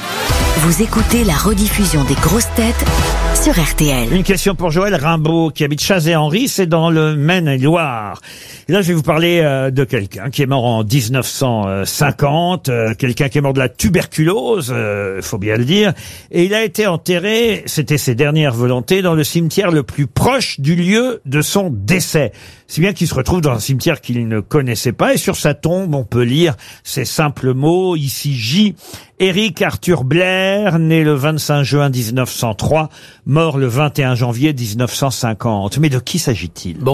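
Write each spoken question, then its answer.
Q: Mais de qui s'agit-il ?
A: George Orwell (Eric Arthur Blair)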